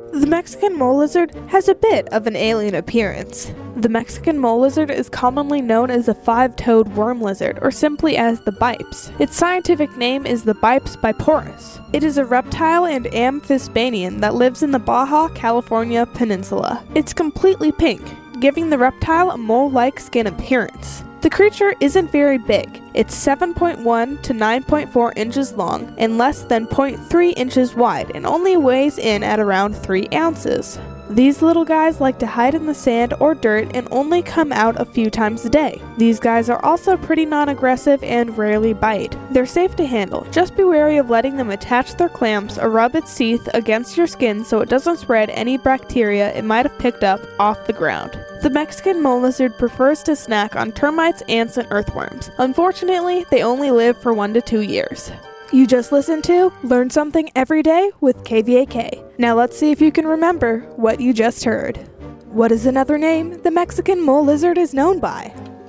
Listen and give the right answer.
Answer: It is also known by the five-toed worm lizard, or Bipes.